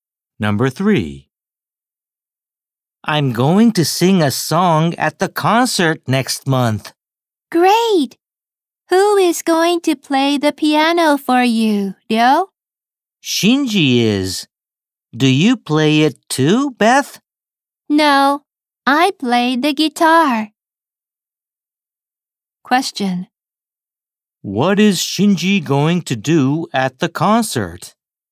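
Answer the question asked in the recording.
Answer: Play the piano.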